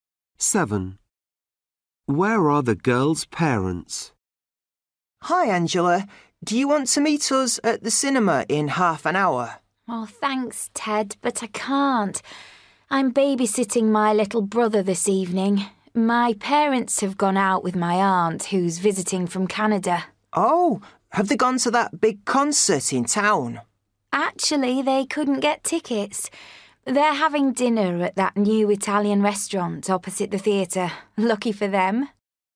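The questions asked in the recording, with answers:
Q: Where are the girl's parents?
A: At the new Italian restaurant opposite the theatre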